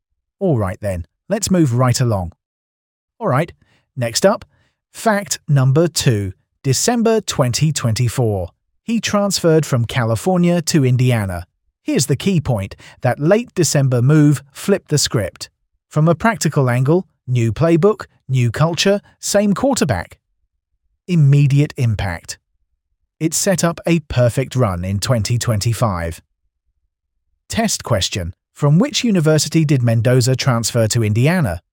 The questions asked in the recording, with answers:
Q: From which university did Mendoza transfer to Indiana?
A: Mile, correct answer, California.